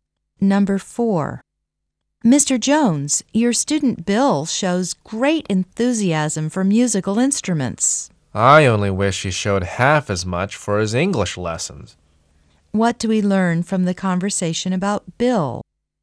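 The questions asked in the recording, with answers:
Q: What do we learn from the conversation about Bill?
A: He is much more interested in music than in English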